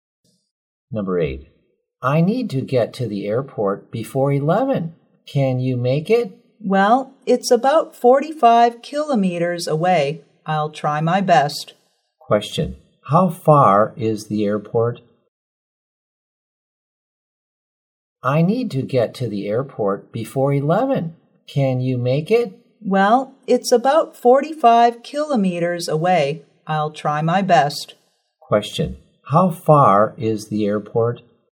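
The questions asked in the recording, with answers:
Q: Question, how far is the airport?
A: About 45 kilometers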